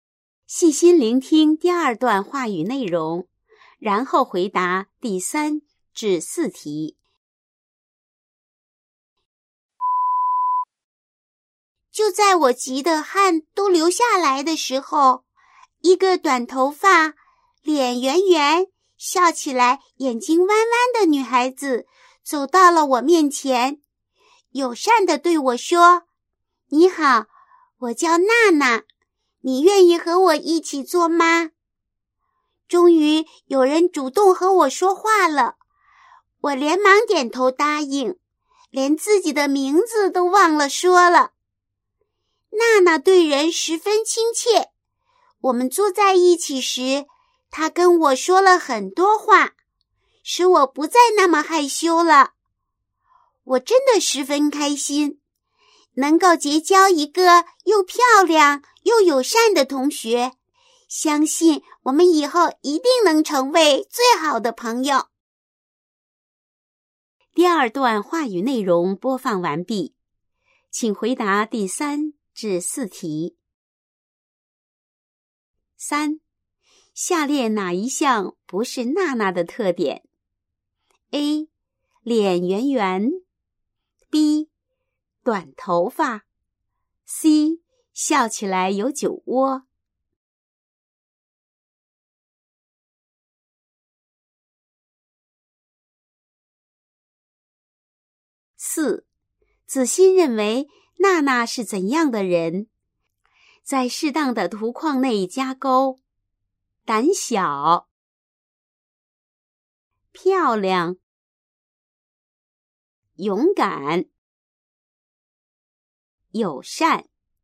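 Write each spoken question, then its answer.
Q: 下列哪一项不是娜娜的特点? A. 脸圆圆, B. 短头发, C. 笑起来有酒窝。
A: C: 笑起来有酒窝

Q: 子欣认为娜娜是怎样的人?在适当的图框内加勾。胆小, 漂亮,勇敢,友善。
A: 漂亮、友善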